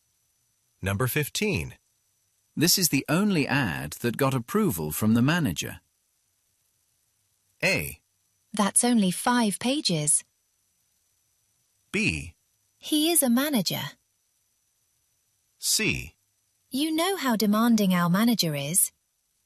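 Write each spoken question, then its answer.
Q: This is the only ad that got approval from the manager.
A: C: You know how demanding our manager is.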